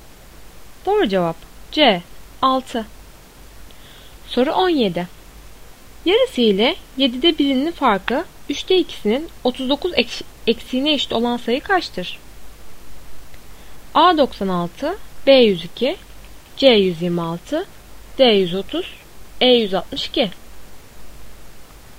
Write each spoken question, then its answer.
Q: Yarısı ile 7'de 1'inin farkı 3'te 2'sinin 39 eksiğine eşit olan sayı kaçtır?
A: Doğru cevap C126.